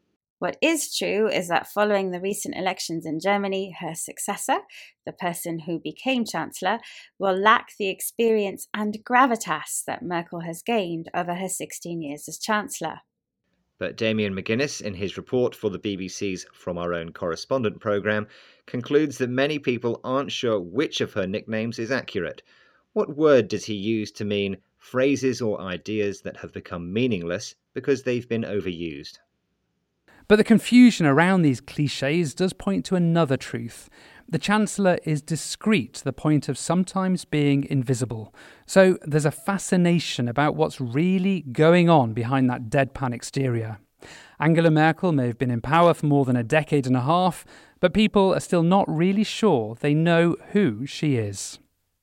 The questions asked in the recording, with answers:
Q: What word does he use to mean phrases or ideas that have become meaningless because they've been overused?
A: He used the word clichés to mean phrases or ideas that have become meaningless because they've been overused.